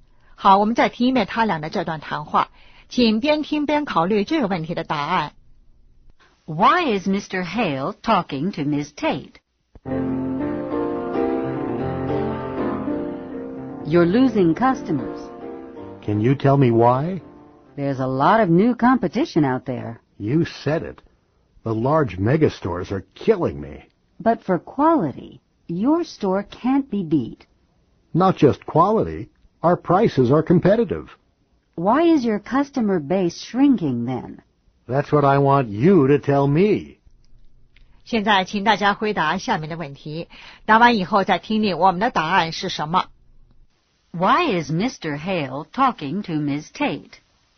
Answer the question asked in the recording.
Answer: To learn why he's losing customers.